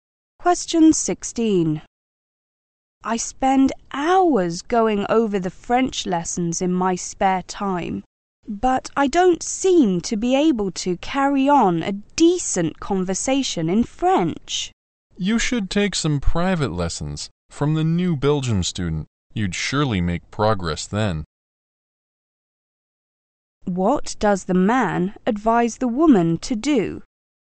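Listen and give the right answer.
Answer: Take private lessons from the new Belgian student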